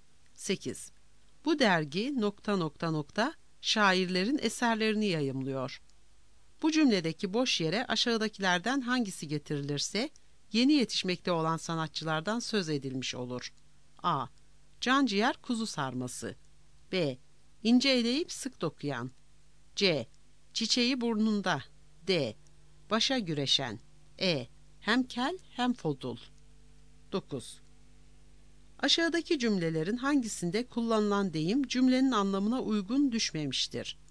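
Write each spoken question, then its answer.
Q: Bu cümledeki boş yere aşağıdakilerden hangisi getirilirse yeni yetişmekte olan sanatçılardan söz edilmiş olur.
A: C: Çiçeği burnunda.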